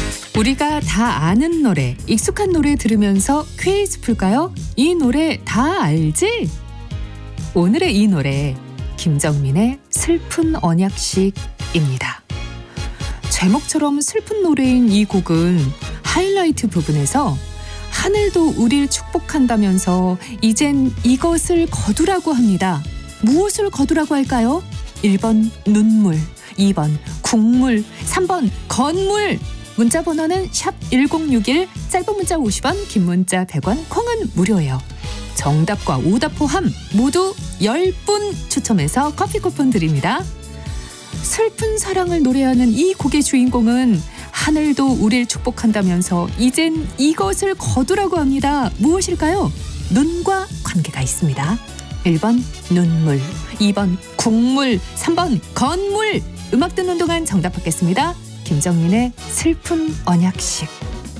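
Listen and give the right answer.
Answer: 1번: 눈물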